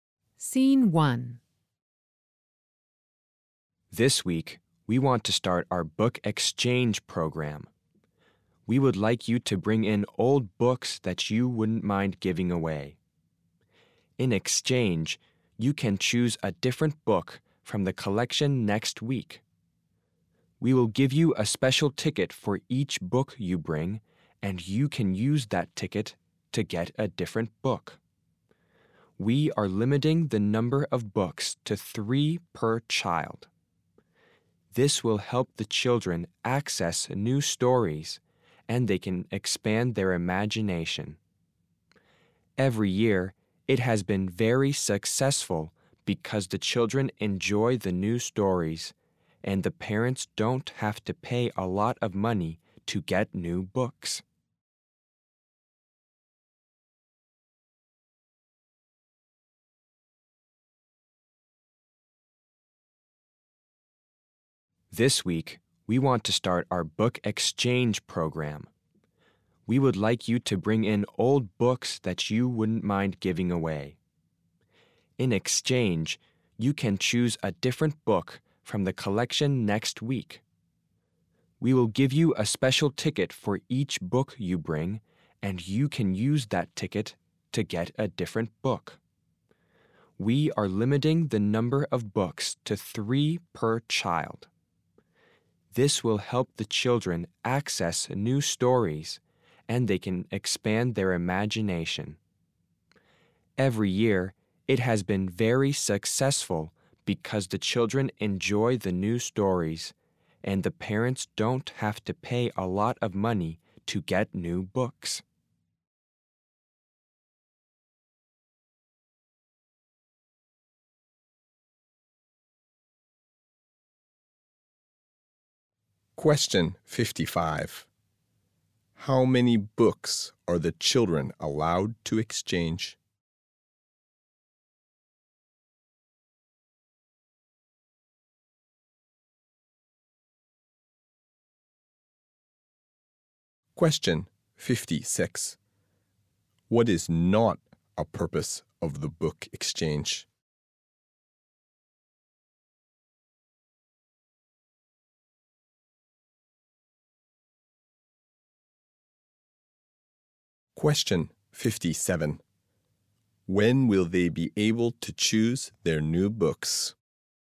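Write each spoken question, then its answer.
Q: How many books are the children allowed to exchange?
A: 3 books per child

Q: When will they be able to choose their new books?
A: Next week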